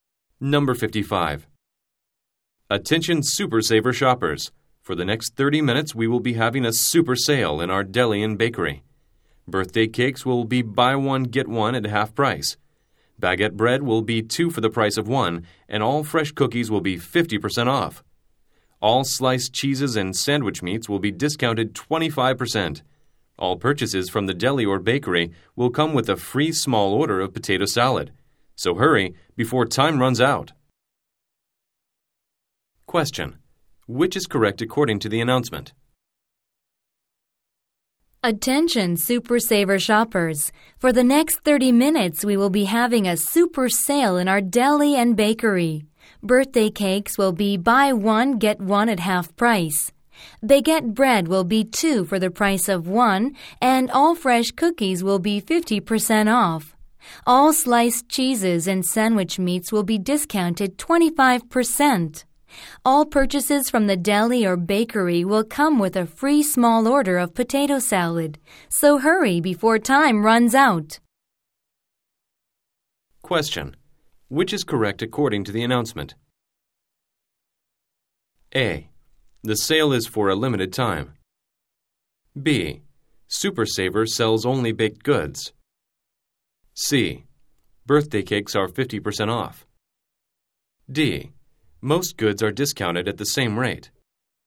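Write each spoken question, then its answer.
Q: Which is correct according to the announcement?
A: A: The sale is for a limited time.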